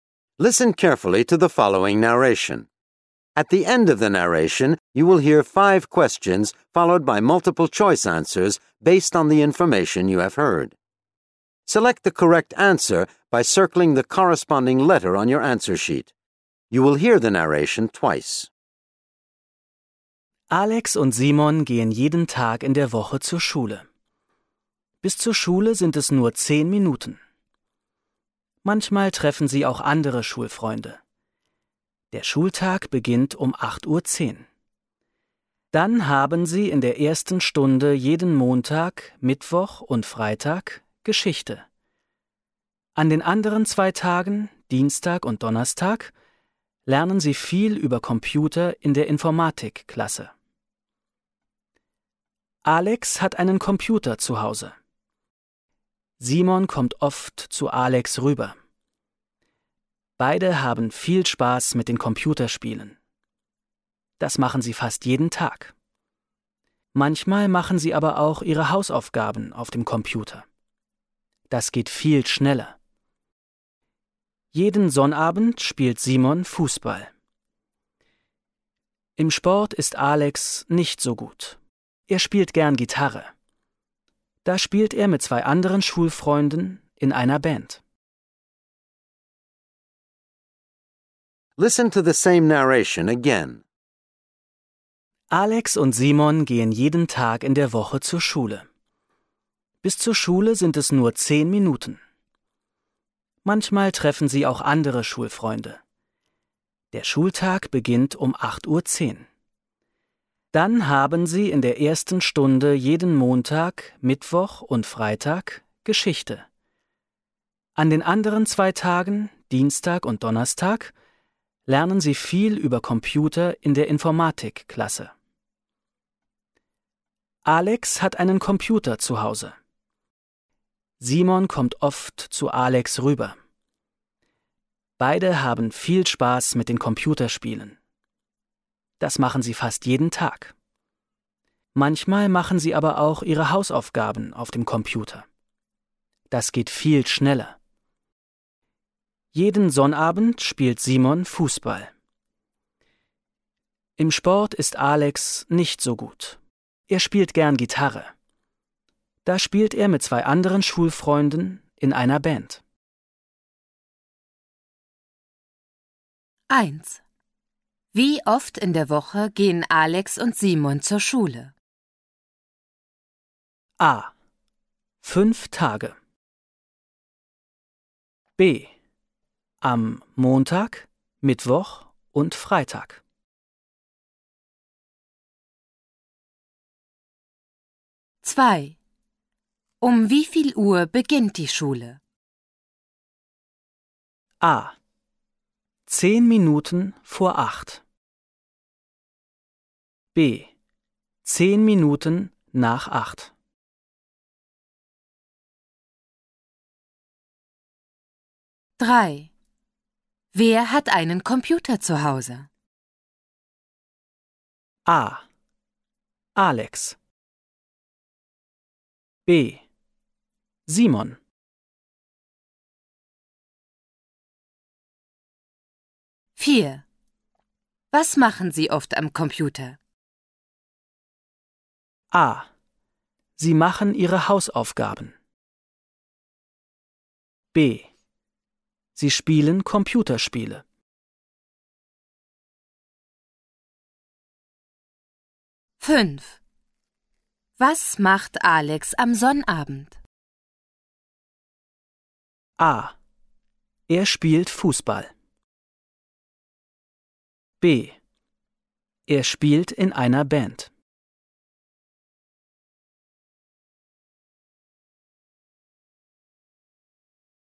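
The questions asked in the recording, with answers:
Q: Wie oft in der Woche gehen Alex und Simon zur Schule?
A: A: 5 Tage.

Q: Um wie viel Uhr beginnt die Schule?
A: B: 10 Minuten nach 8.

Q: Wer hat einen Computer zu Hause?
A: A: Alex.

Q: Was machen Sie oft am Computer?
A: B: Sie spielen Computerspiele.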